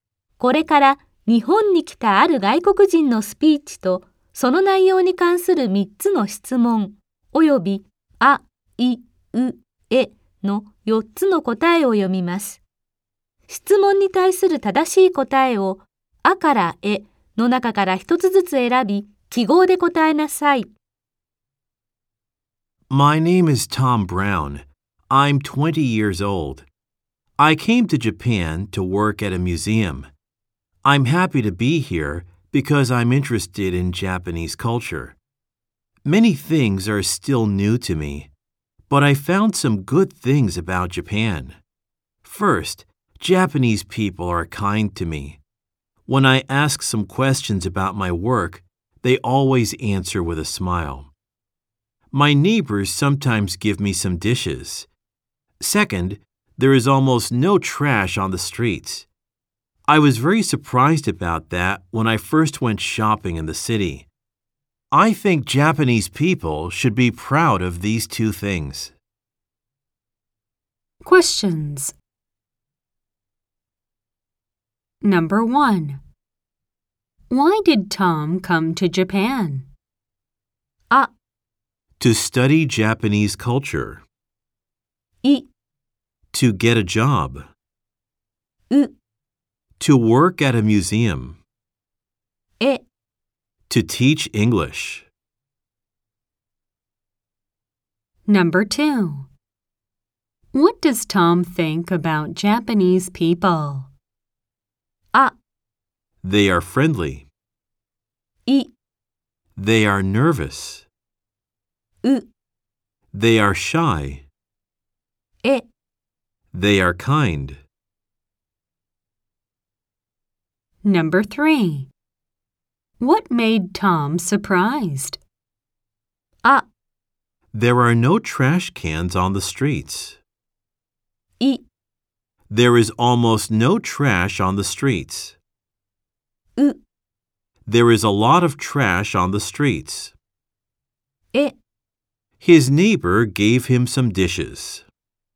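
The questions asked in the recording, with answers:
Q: Why did Tom come to Japan?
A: う: To work at a museum.

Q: What does Tom think about Japanese people?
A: え: They are kind.

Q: What made Tom surprised?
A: い: There is almost no trash on the streets.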